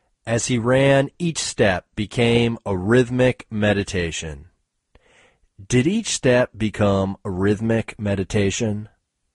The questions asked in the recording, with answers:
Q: Did each step become a rhythmic meditation?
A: Yes, each step became a rhythmic meditation.